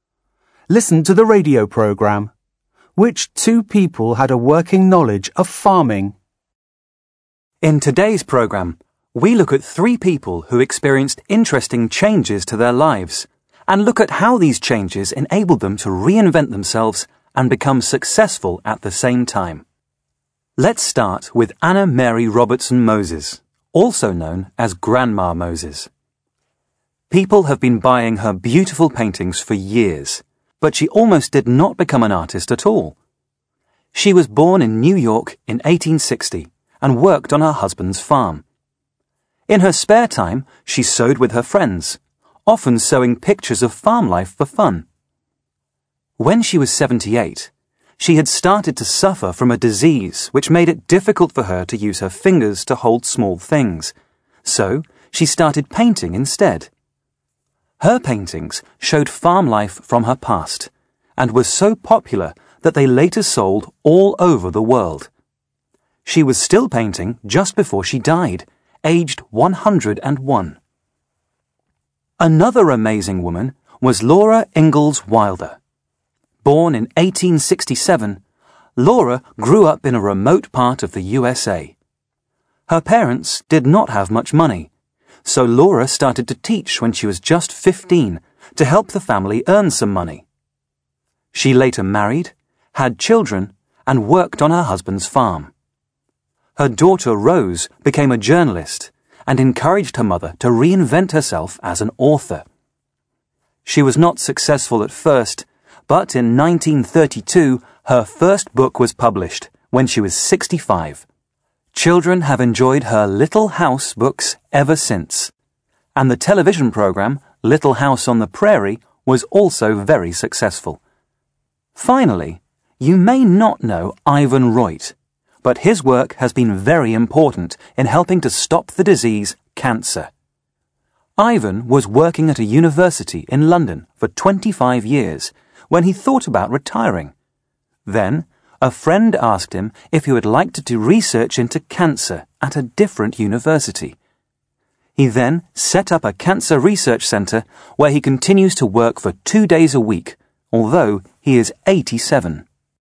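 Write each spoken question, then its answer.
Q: Which two people had a working knowledge of farming?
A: Grandma Moses (Anna Mary Robertson Moses) and Laura Ingalls Wilder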